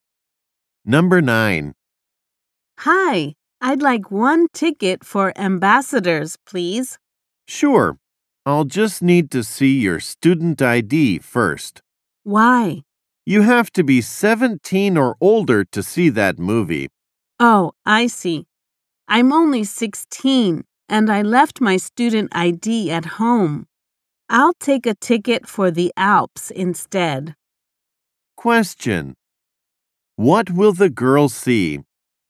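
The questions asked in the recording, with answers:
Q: What will the girl see?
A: The Alps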